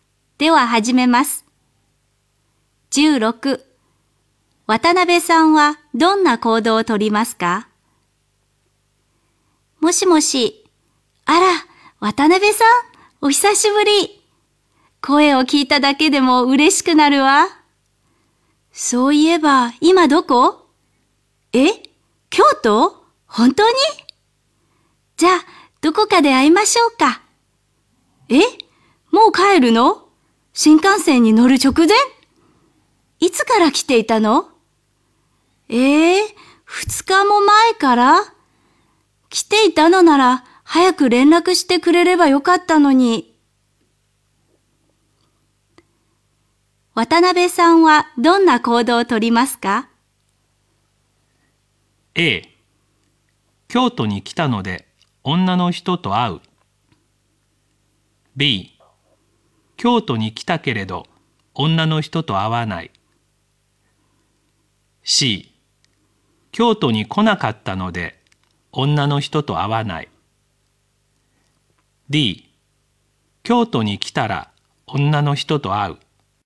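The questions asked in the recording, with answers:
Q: 渡辺さんはどんな行動をとりますか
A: B: 京都に来たけれど女の人と会わない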